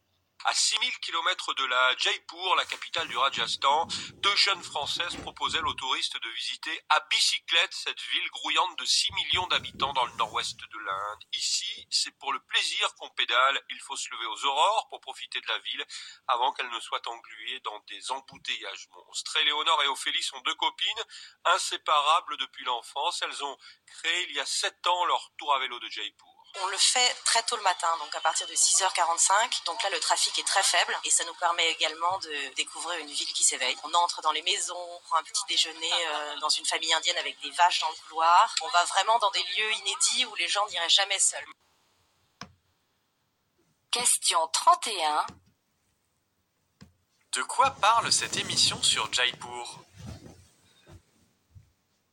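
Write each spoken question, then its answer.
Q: De quoi parle cette émission sur Jaipur ?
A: De visites de Jaipur à vélo, tôt le matin, proposées aux touristes par deux jeunes Françaises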